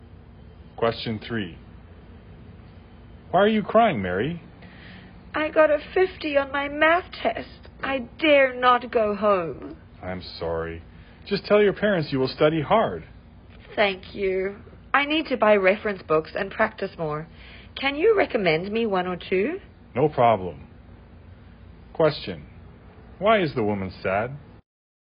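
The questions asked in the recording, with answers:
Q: Why is the woman sad?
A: She got a 50 on her math test.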